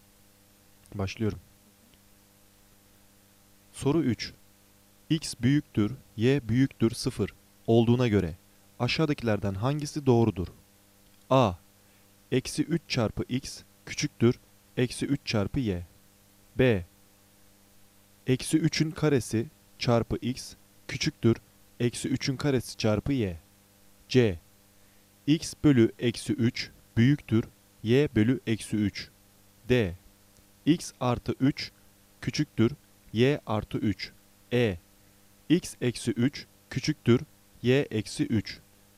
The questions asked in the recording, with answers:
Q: X büyüktür, Y büyüktür 0 olduğuna göre aşağıdakilerden hangisi doğrudur?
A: Doğru cevap A. Eksi 3 çarpı x küçüktür, eksi 3 çarpı y.